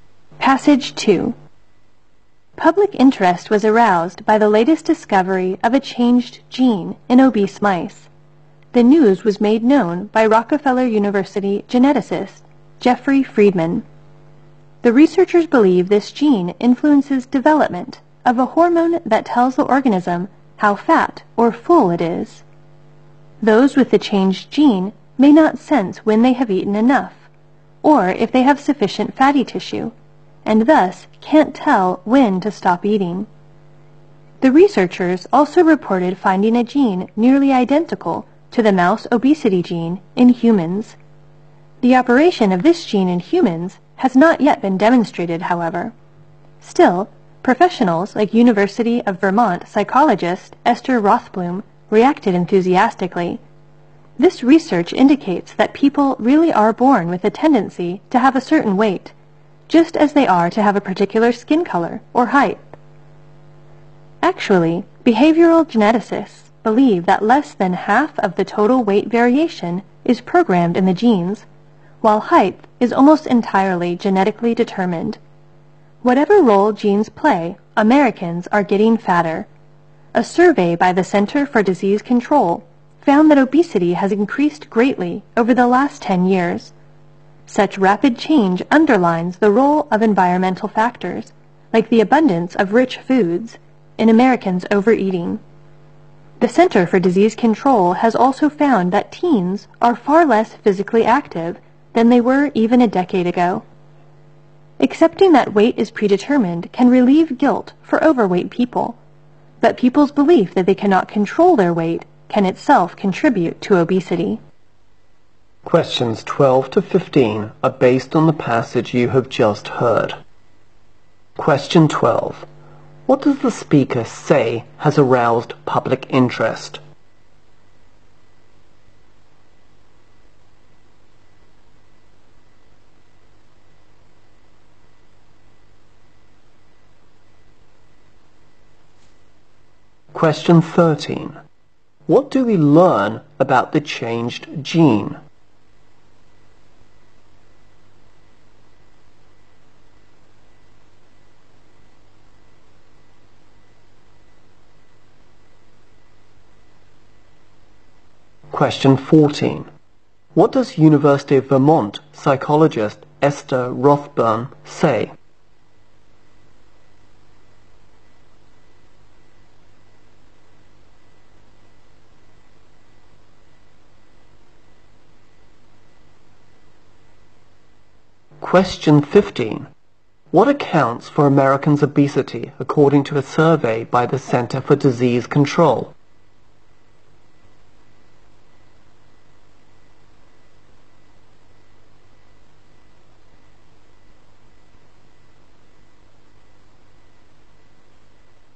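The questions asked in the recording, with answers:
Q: What does the speaker say has aroused public interest?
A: The discovery of a changed gene in obese mice

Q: What do we learn about the changed gene?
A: It influences a hormone that tells the organism how fat or full it is, so carriers may not know when to stop eating

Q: What does University of Vermont psychologist Esther Rothblum say?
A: People are born with a tendency to have a certain weight

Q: What accounts for Americans' obesity according to a survey by the Center for Disease Control?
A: Environmental factors, like the abundance of rich foods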